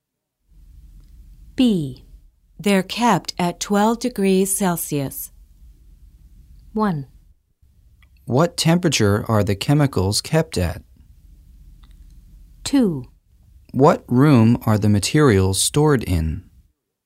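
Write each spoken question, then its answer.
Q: They're kept at 12 degrees Celsius.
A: 1: What temperature are the chemicals kept at?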